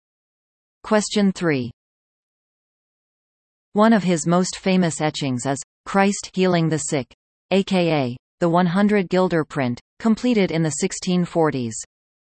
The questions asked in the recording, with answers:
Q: One of his most famous etchings is Christ Healing the Sick, aka the 100 Guilder print, completed in the 1640s.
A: The answer? Rembrandt.